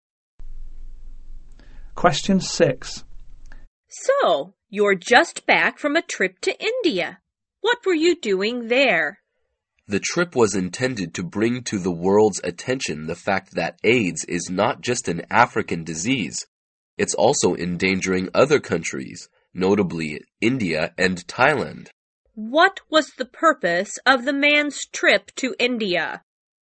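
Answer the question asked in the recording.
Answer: To draw the world's attention to the fact that AIDS is not just an African disease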